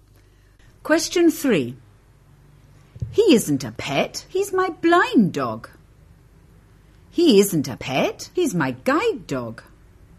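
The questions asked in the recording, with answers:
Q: He isn't a pet, he's my blind dog.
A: B: He isn't a pet, he's my guide dog.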